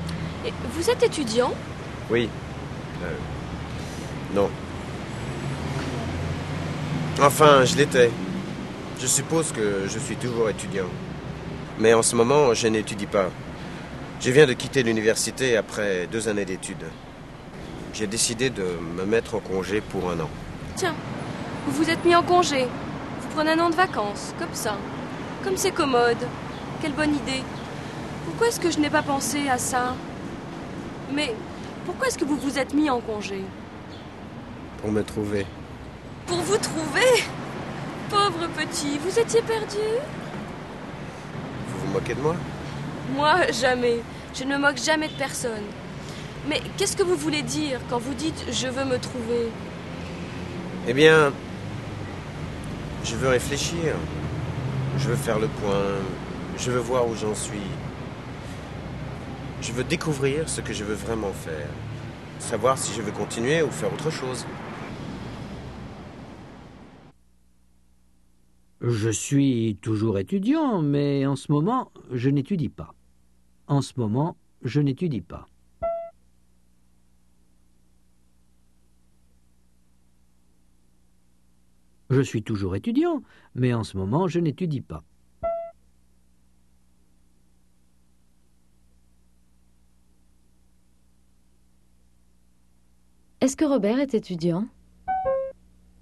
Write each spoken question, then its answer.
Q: Est-ce que Robert est étudiant?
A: Oui, mais en ce moment, il n'étudie pas.